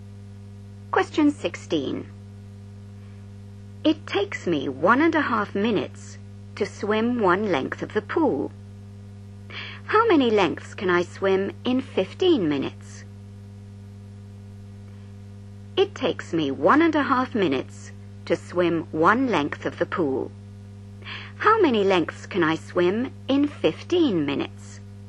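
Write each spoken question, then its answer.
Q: How many lengths can I swim in 15 minutes?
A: 10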